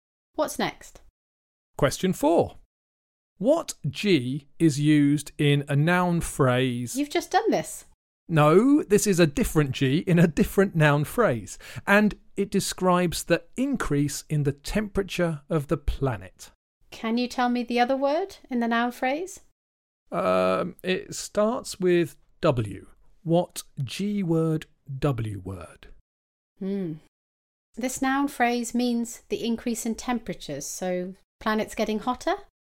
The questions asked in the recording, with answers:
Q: What G is used in a noun phrase?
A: Warming, global warming.